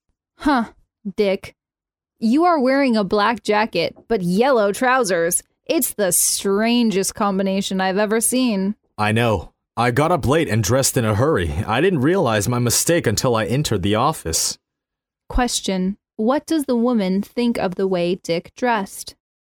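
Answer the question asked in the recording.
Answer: It is very strange.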